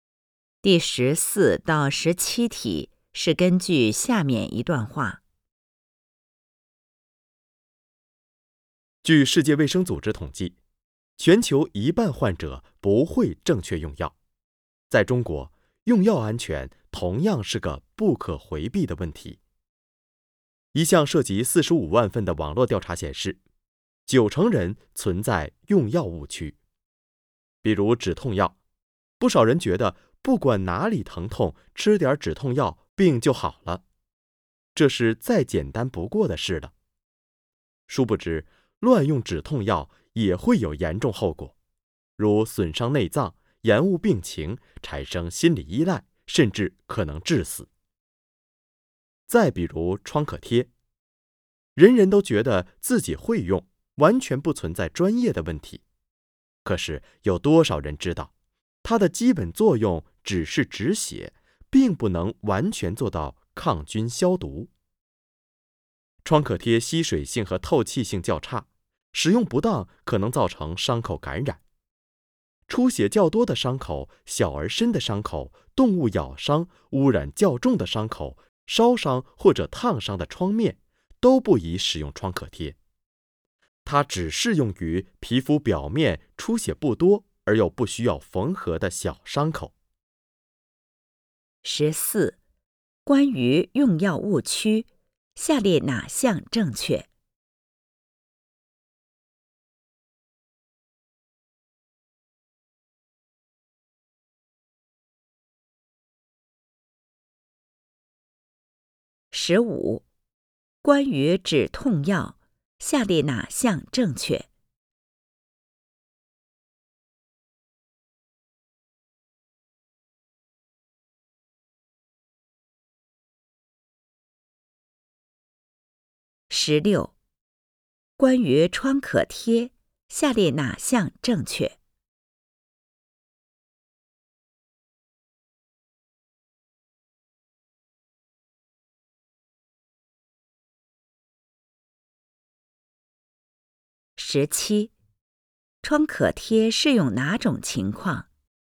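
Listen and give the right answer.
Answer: 皮肤表面出血不多而又不需要缝合的小伤口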